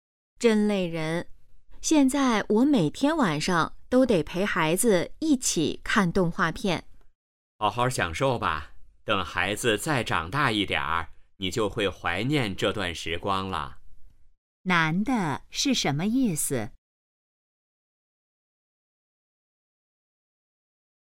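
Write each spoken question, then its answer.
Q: 男的是什么意思?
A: 要好好享受陪孩子的时光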